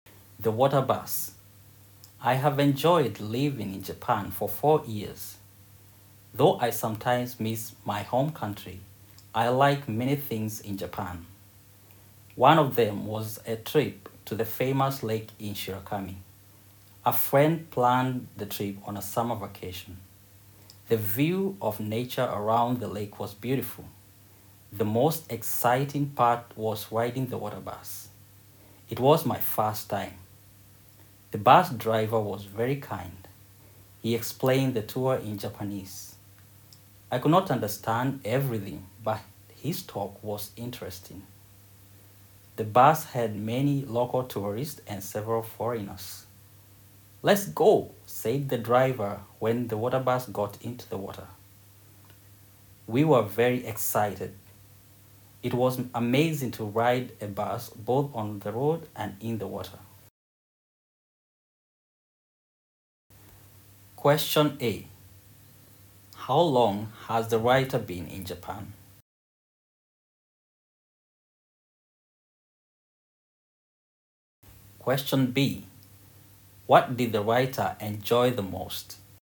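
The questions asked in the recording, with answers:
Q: How long has the writer been in Japan?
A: For 4 years.

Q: What did the writer enjoy the most?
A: Riding the water bus.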